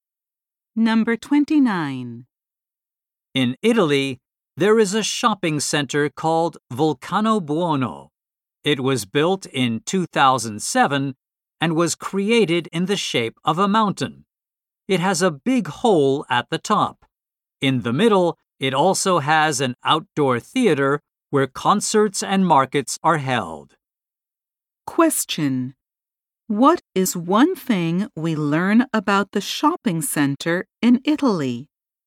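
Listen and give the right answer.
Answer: It is shaped like a mountain.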